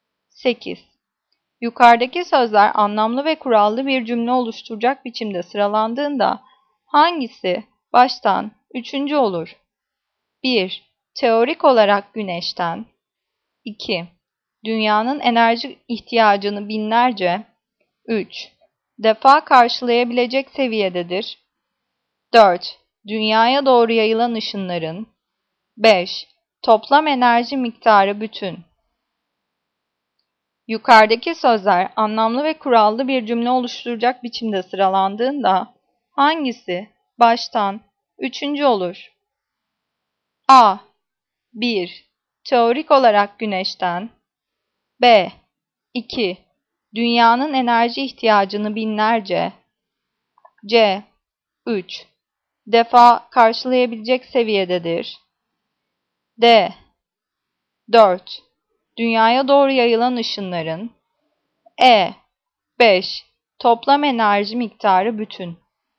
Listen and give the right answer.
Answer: Cevap E. 5. Toplam enerji miktarı bütün.